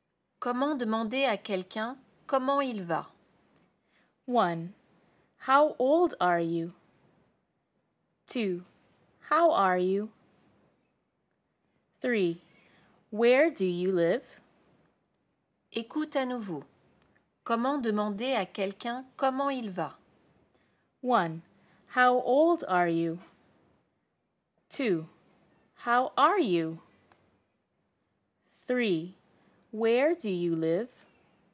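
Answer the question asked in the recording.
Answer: 2: How are you?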